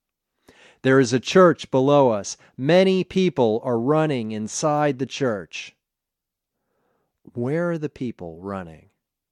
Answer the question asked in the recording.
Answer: They are running inside the church.